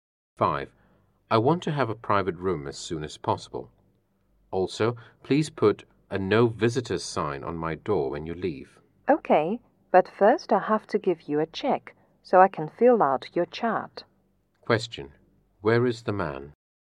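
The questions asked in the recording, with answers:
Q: Where is the man?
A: In a hospital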